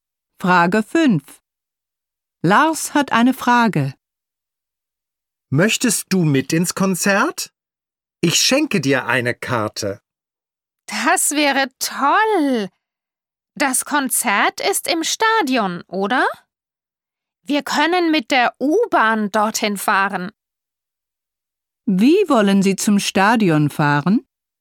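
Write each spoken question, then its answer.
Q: Wie wollen Sie zum Stadion fahren?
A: Mit der U-Bahn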